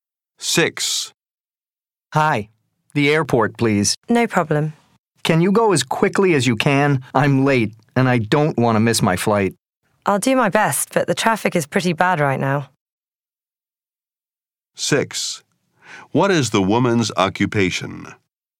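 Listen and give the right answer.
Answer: Taxi driver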